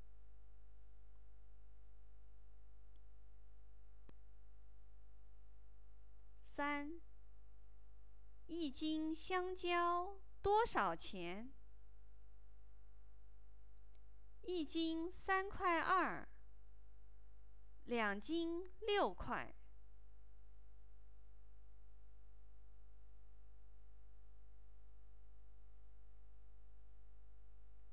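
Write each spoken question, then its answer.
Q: 一斤香蕉多少钱?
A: 3.2块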